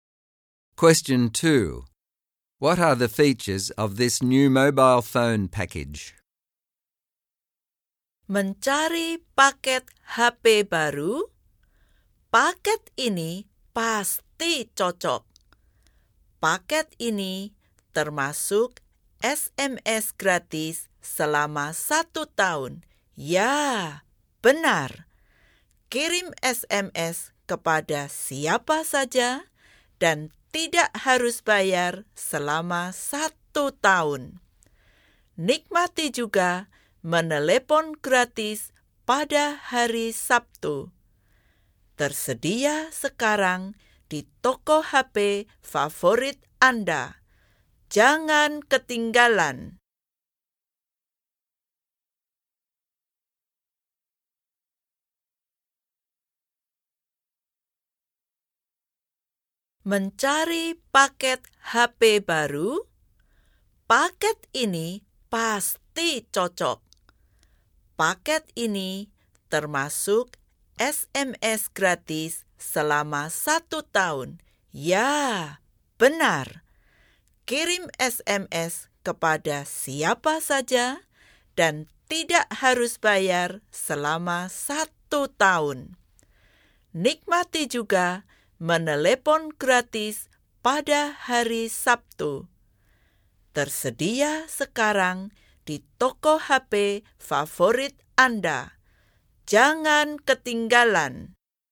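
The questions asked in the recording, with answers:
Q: What are the features of this new mobile phone package?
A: Free SMS to anyone for one year, and free calls on Saturdays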